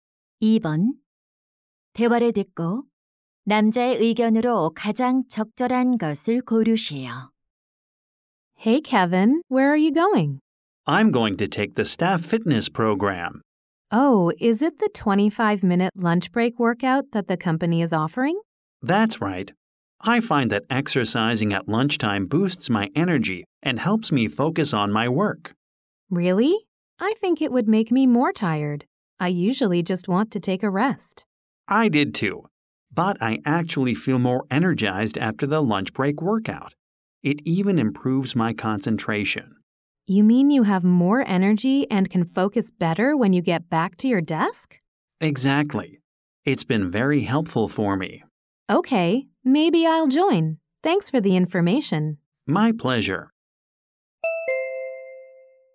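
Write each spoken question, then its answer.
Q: 대화를 듣고 남자의 의견으로 가장 적절한 것을 고르시오.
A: 점심시간 운동은 활력과 집중력을 높여 준다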